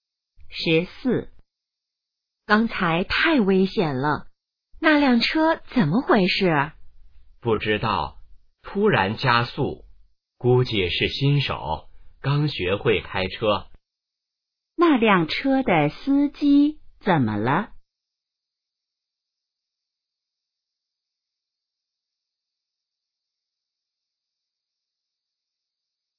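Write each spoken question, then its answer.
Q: 那辆车的司机怎么了?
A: 可能是新手,刚学会开车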